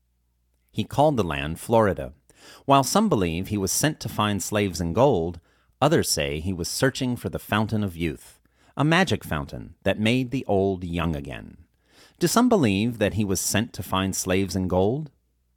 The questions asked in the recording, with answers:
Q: Do some believe that he was sent to find slaves and gold?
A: Yes, some believe that he was sent to find slaves and gold.